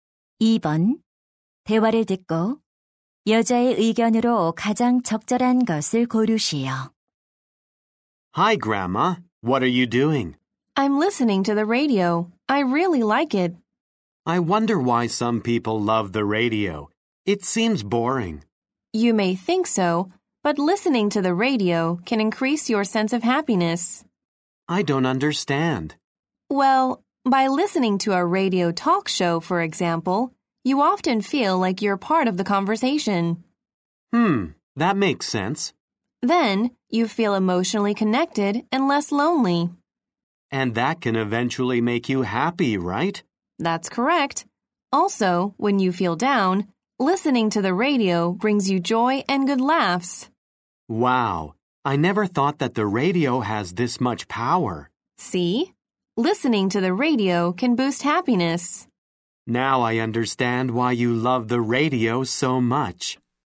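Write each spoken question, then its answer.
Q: 대화를 듣고 여자의 의견으로 가장 적절한 것을 고르시오.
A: 라디오를 듣는 것은 행복감을 높일 수 있다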